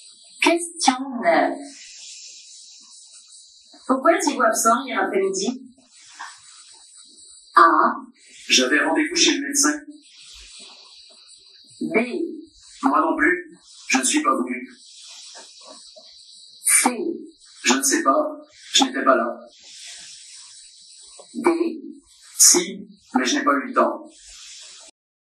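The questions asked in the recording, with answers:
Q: Pourquoi étiez-vous absent hier après-midi?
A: A: J'avais rendez-vous chez le médecin.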